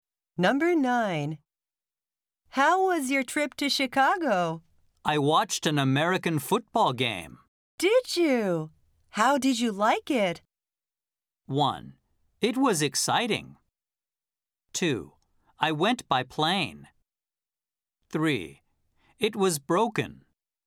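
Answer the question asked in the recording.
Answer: 1: It was exciting.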